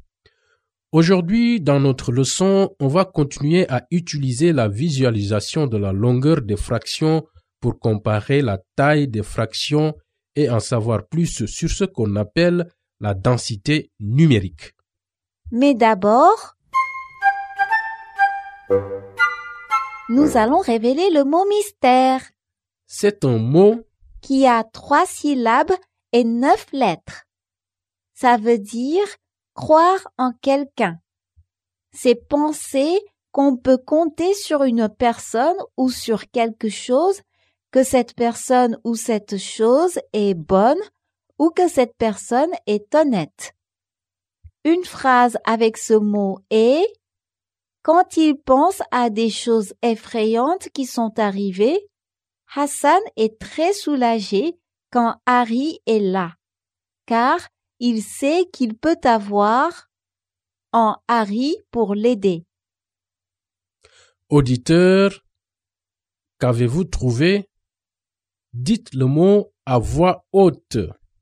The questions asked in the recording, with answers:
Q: Auditeur, qu'avez-vous trouvé?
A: Le mot mystère est confiance.